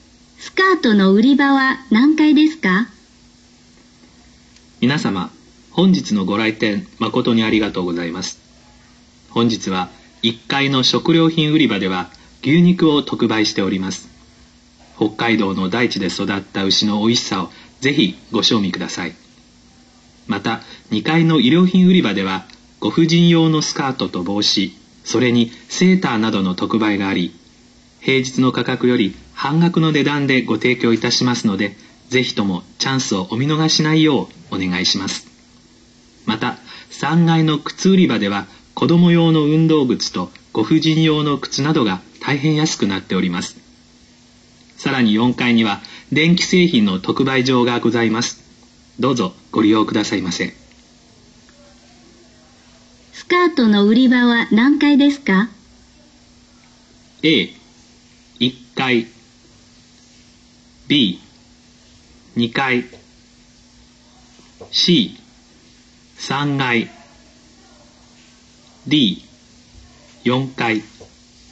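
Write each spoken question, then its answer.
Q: スカートの売り場は何階ですか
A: B: 2階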